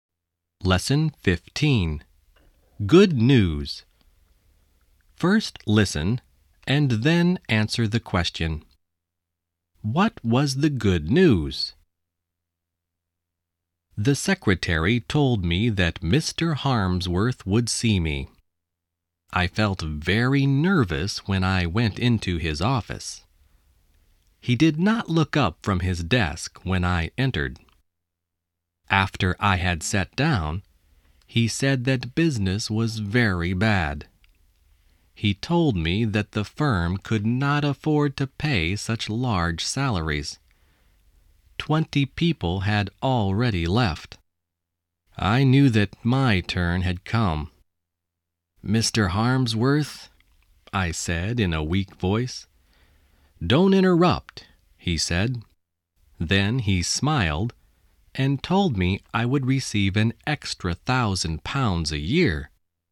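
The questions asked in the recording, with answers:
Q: What was the good news?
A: He would receive an extra £1,000 a year.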